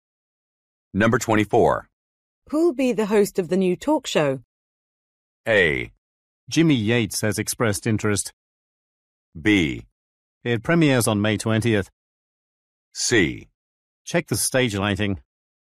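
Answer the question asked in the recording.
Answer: A: Jimmy Yates has expressed interest.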